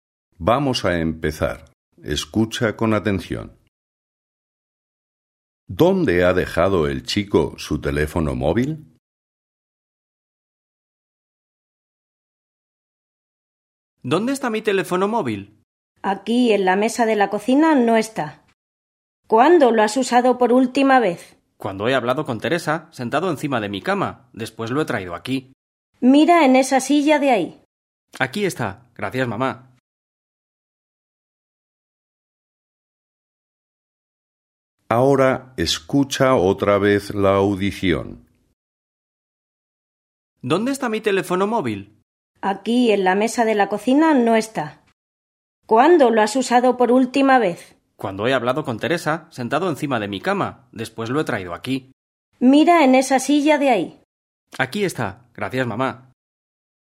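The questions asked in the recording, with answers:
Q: ¿Dónde ha dejado el chico su teléfono móvil?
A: En una silla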